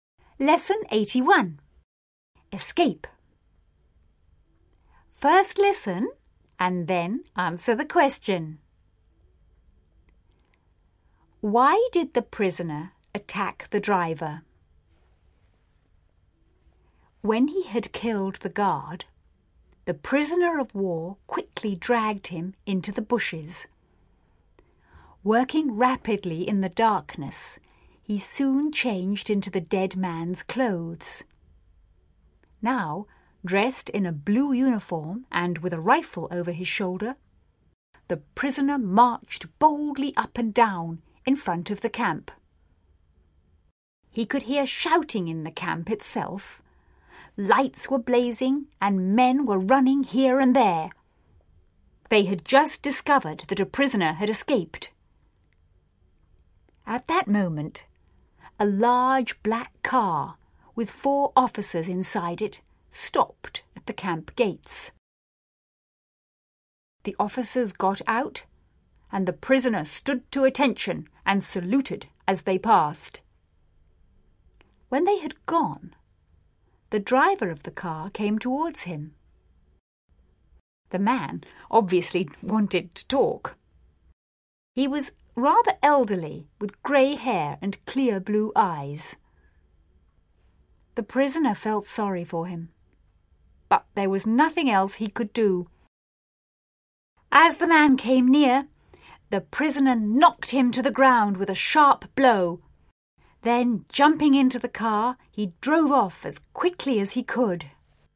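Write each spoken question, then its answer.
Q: Why did the prisoner attack the driver?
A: So he could take the car and escape.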